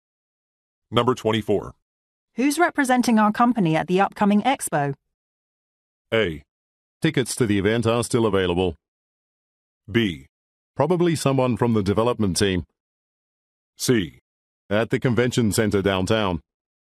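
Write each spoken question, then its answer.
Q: Who's representing our company at the upcoming expo?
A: B: Probably someone from the development team.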